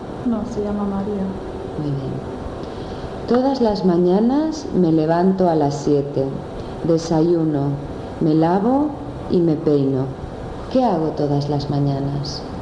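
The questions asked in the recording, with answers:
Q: ¿Qué hago todas las mañanas?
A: Te levantas a las 7, desayunas, te lavas y te peinas.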